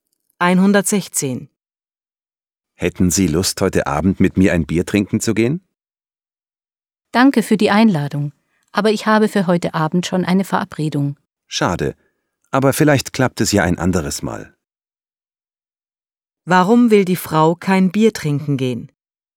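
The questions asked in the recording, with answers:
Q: Warum will die Frau kein Bier trinken gehen?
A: Sie hat schon eine Verabredung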